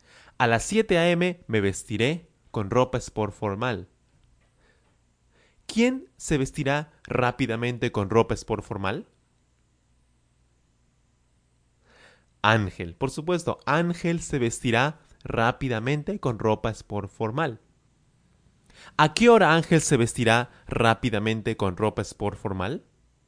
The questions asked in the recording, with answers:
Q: ¿A qué hora Ángel se vestirá rápidamente con ropa sport formal?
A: A las 7 a.m. A las 7 a.m.